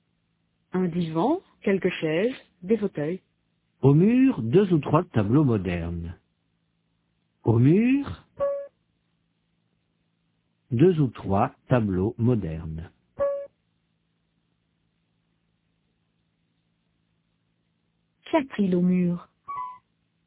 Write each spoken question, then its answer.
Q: Qu'y a-t-il au mur?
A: Deux ou trois tableaux modernes.